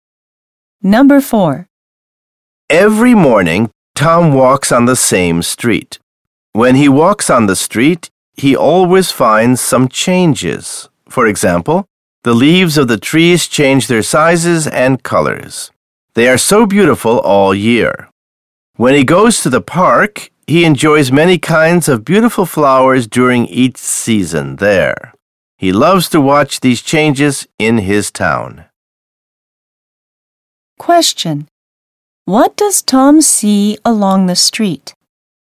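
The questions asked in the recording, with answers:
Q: What does Tom see along the street?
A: Trees whose leaves change size and color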